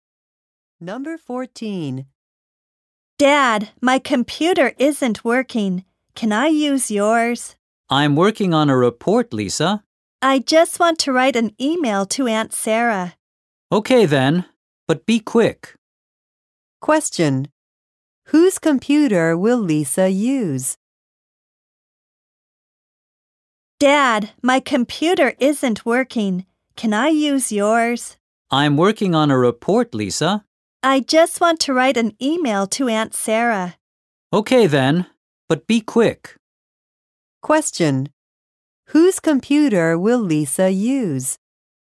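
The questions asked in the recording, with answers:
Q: Whose computer will Lisa use?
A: Her father's.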